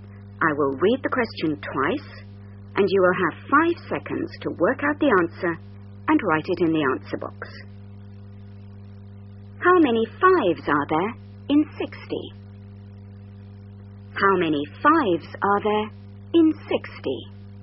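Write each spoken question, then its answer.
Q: How many fives are there in 60?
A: 12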